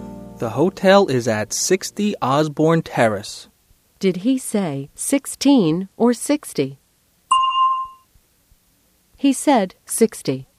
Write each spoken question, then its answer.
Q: Did he say 16 or 60?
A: He said 60.